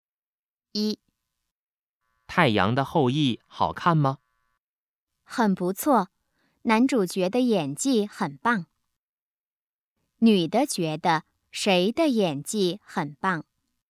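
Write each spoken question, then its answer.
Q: 女的觉得谁的演技很棒?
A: 男主角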